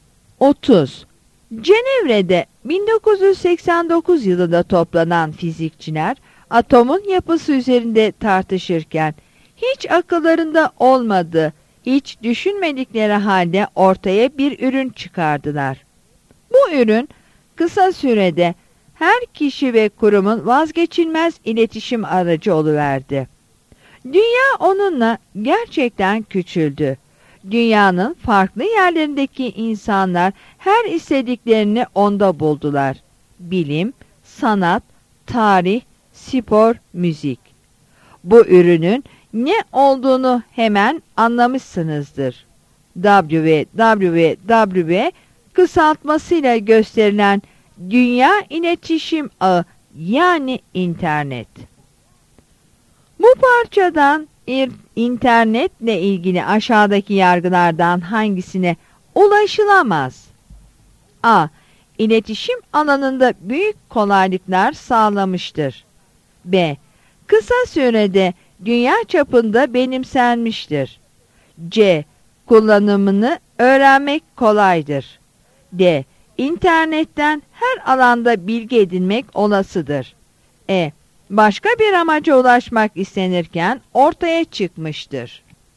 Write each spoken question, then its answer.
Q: Bu parçadan internetle ilgili aşağıdaki yargılardan hangisine ulaşılamaz?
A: Yanıt C'dir.